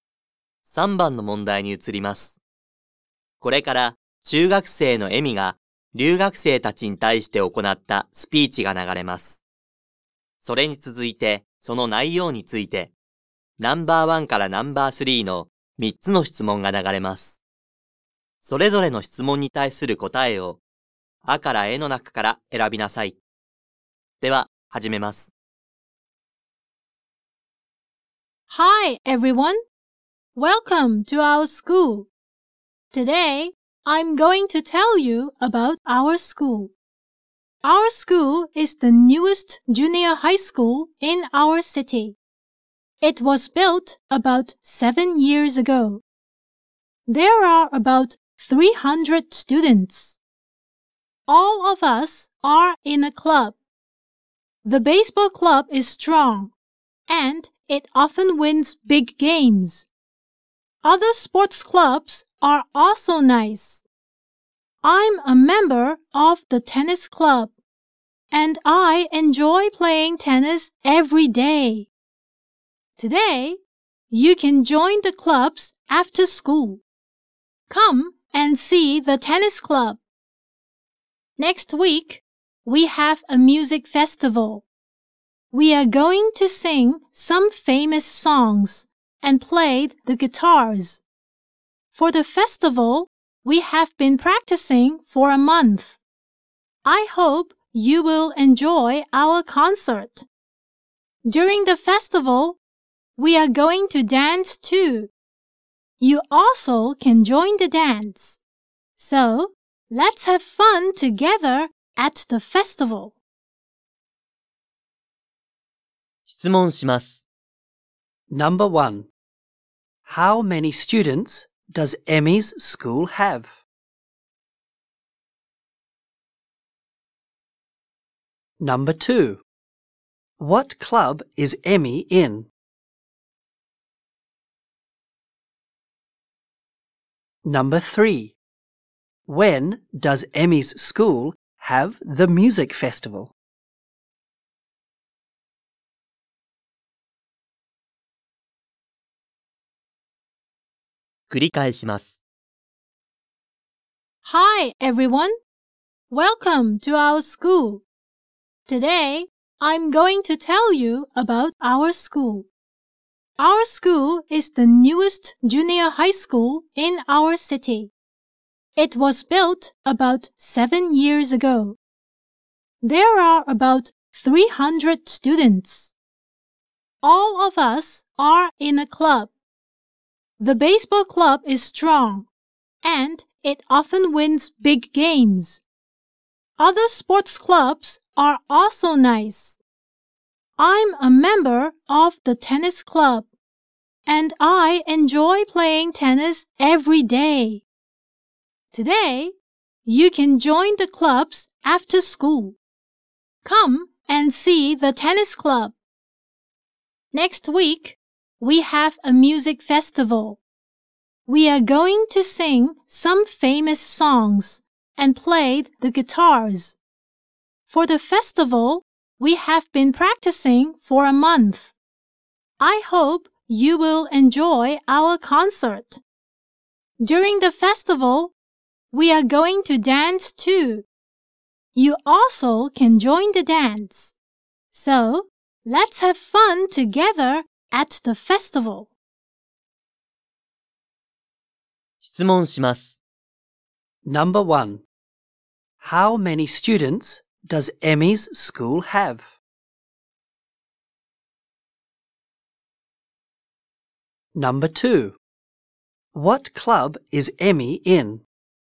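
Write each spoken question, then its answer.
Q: Number 1. How many students does Emmy's school have?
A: About 300.

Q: Number 2. What club is Emmy in?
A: The tennis club.

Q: Number 3. When does Emmy's school have the music festival?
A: Next week.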